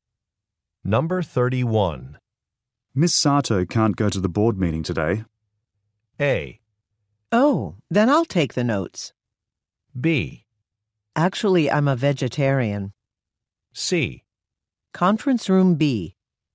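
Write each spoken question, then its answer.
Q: Miss Sato can't go to the board meeting today.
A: A: Oh, then I'll take the notes.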